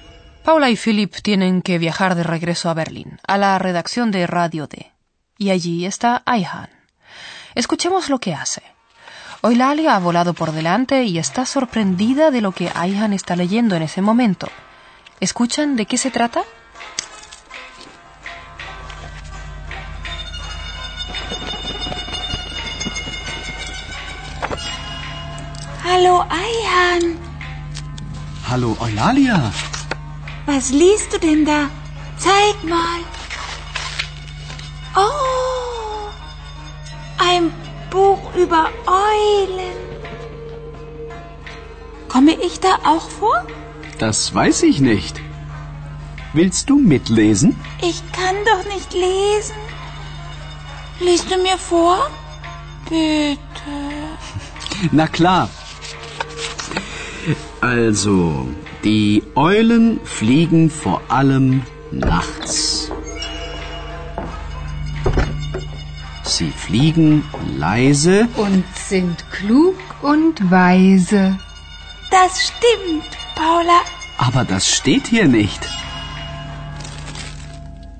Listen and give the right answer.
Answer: Ayhan está leyendo un libro.